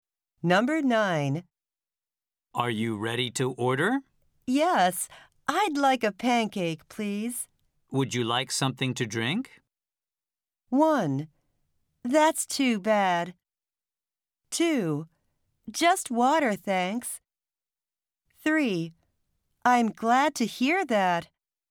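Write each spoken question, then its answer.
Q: Would you like something to drink?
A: 2: Just water, thanks.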